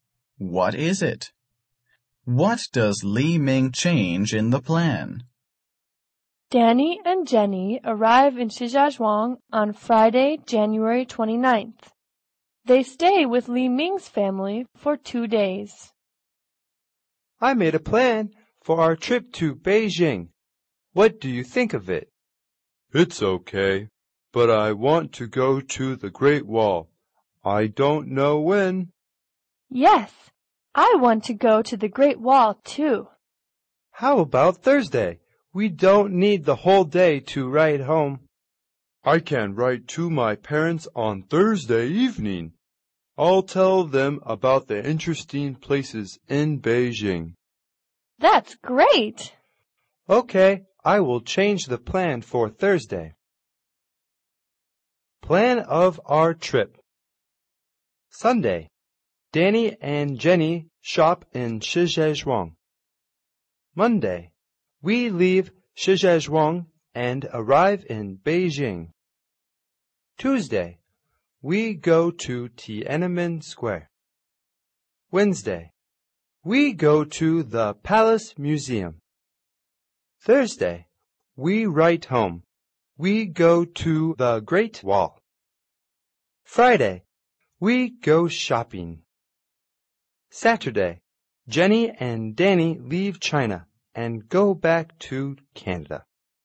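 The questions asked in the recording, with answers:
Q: What does Li Ming change in the plan?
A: He adds a trip to the Great Wall on Thursday.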